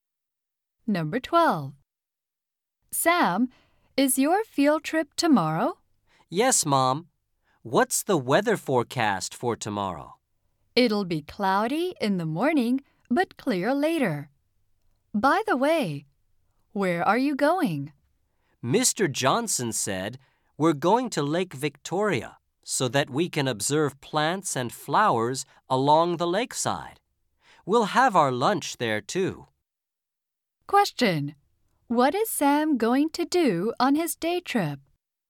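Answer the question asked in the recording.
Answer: Observe plants and flowers along Lake Victoria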